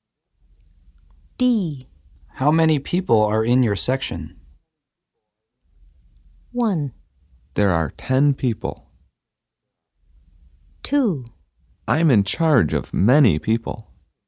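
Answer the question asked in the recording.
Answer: 1: There are 10 people.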